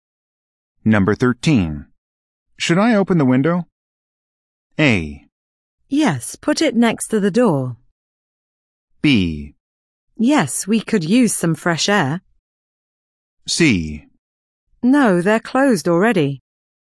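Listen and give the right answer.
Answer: B: Yes, we could use some fresh air.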